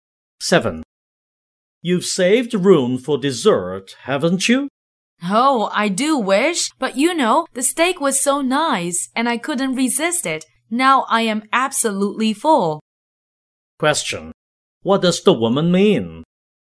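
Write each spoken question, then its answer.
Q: What does the woman mean?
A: She is too full to have dessert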